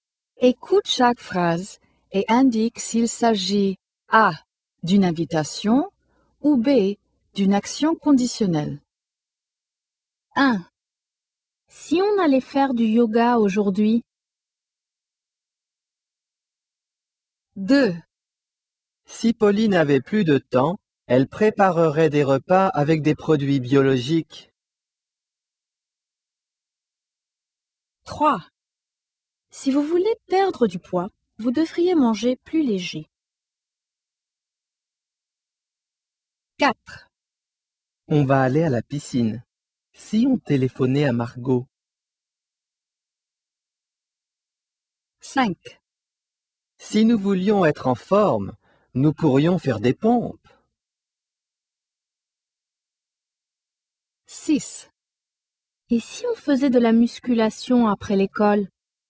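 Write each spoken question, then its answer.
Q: Si on allait faire du yoga aujourd'hui?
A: A: une invitation

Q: Si Pauline avait plus de temps, elle préparerait des repas avec des produits biologiques.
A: B: une action conditionnelle

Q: Si vous voulez perdre du poids, vous devriez manger plus léger.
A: B: une action conditionnelle

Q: Si on téléphonait à Margot.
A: A: une invitation

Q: Si nous voulions être en forme, nous pourrions faire des pompes.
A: B: une action conditionnelle

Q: Et si on faisait de la musculation après l'école ?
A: A: une invitation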